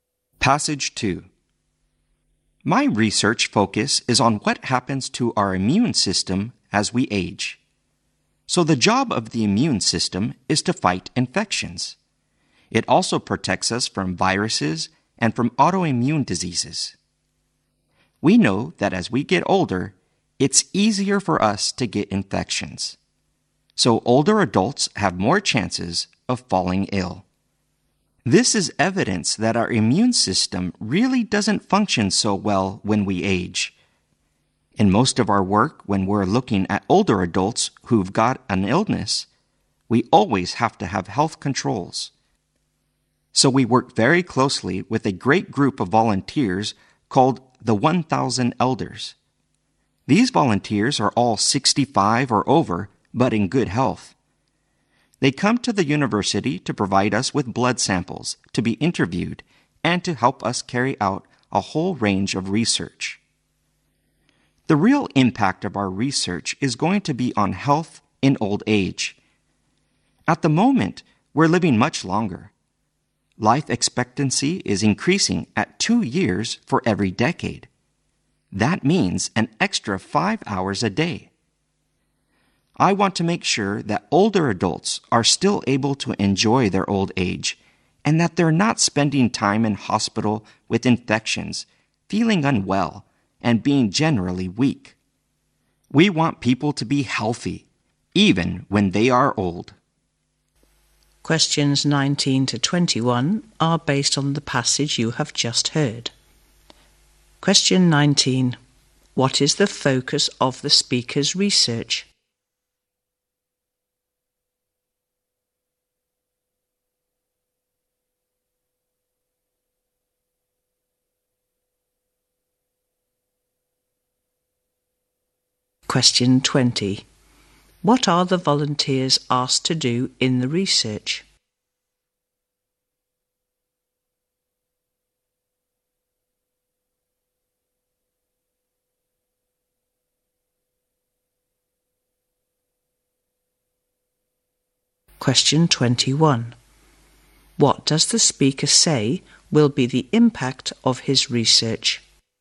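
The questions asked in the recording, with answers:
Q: What is the focus of the speaker's research?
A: What happens to our immune system as we age.

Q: What are the volunteers asked to do in the research?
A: Give blood samples, be interviewed, and help with research.

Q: What does the speaker say will be the impact of his research?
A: It will improve people's health in old age.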